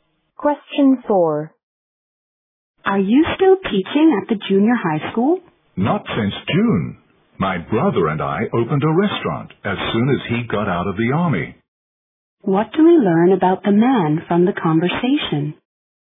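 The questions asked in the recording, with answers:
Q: What do we learn about the man from the conversation?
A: He stopped teaching in June and opened a restaurant with his brother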